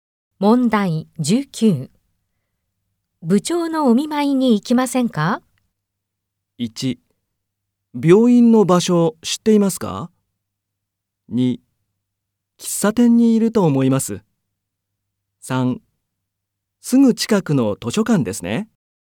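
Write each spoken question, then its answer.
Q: 部長のお見舞いに行きませんか?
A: 2: 病院の場所知っていますか?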